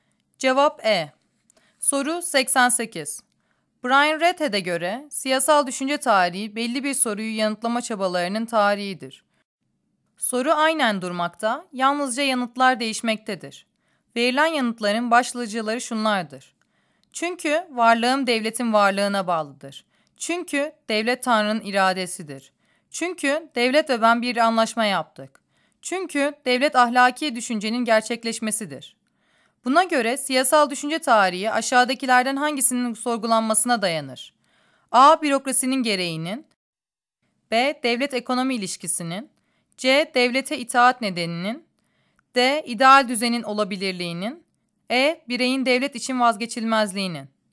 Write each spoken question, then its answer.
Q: Buna göre siyasal düşünce tarihi aşağıdakilerden hangisinin sorgulanmasına dayanır?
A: Cevap C.